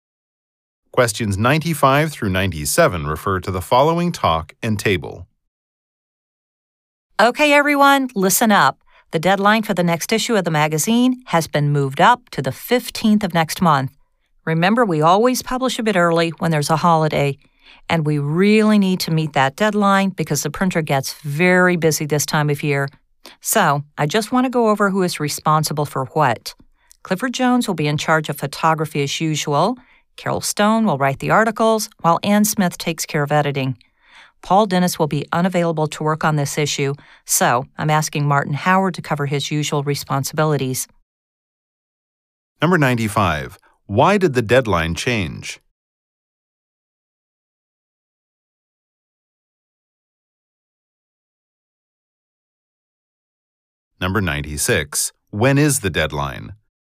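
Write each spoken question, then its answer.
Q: Why did the deadline change?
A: Because of a holiday (they publish early and the printer is busy)

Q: When is the deadline?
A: The 15th of next month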